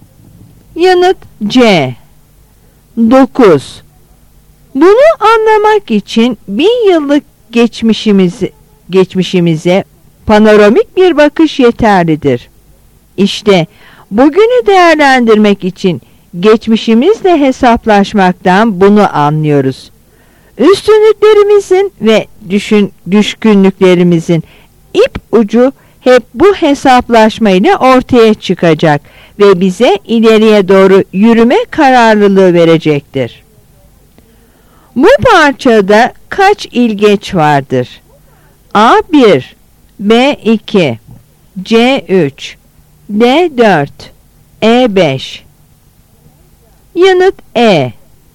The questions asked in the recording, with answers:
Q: Bu parçada kaç ilgeç vardır?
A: Yanıt E.